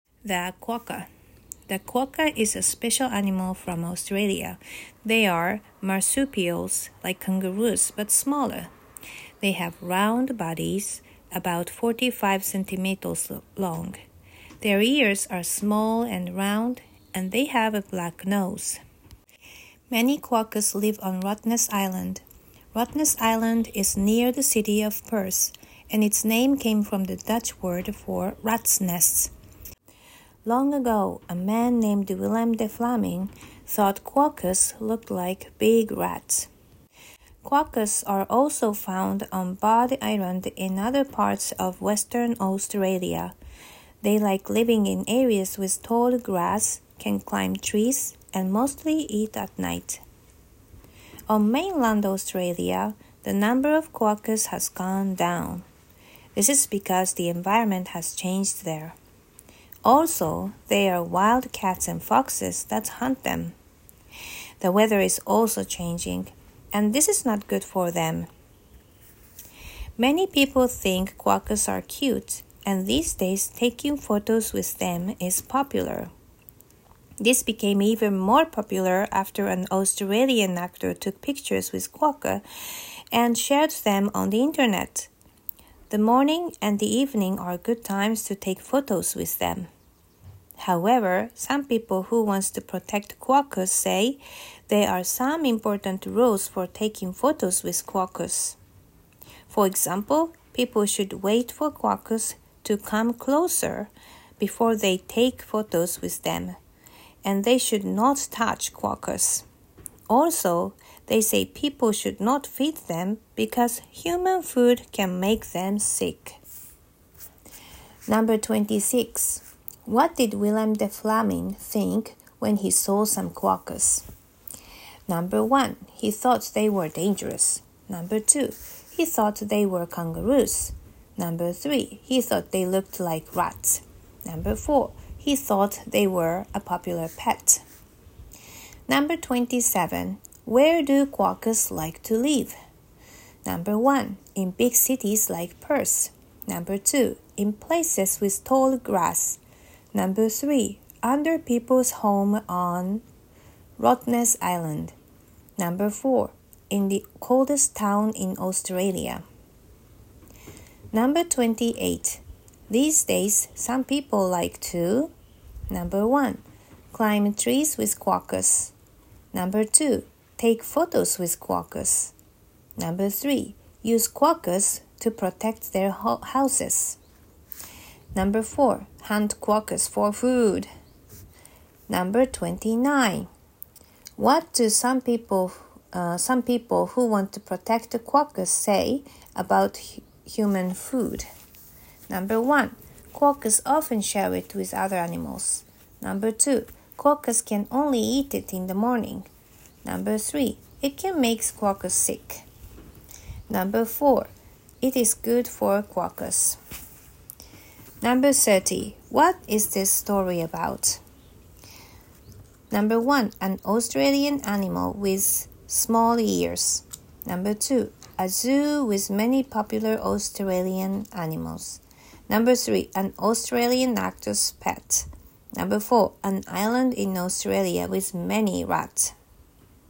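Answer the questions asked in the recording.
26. 3: He thought they looked like rats.
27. 2: In places with tall grass.
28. 2: Take photos with quokkas.
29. 3: It can make quokkas sick.
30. 1: An Australian animal with small ears.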